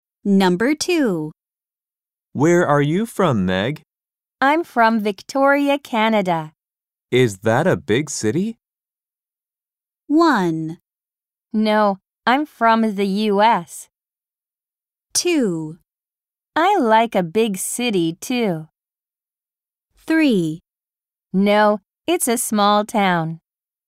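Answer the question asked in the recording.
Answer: 3: No, it's a small town.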